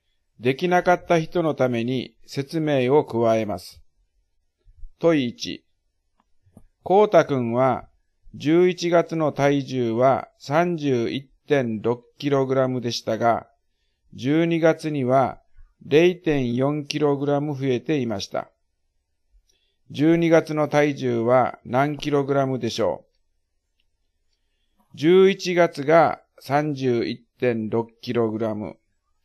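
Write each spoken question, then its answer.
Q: 12月の体重は何 kg でしょう?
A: 32kg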